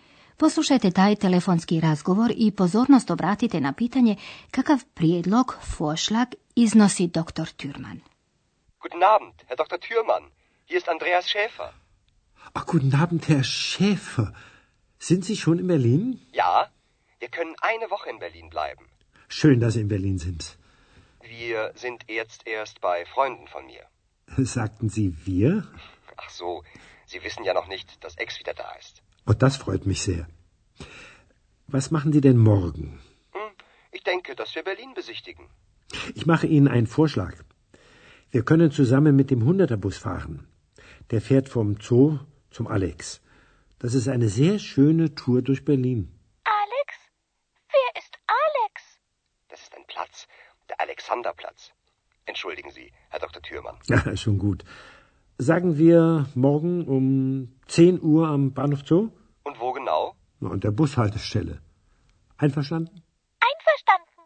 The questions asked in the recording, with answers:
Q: Poslušajte taj telefonski razgovor i pozornost obratite na pitanje kakav prijedlog Vorschlag iznosi dr.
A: Dr. Thürman predlaže vožnju autobusom kroz Berlin kako bi razgledali grad.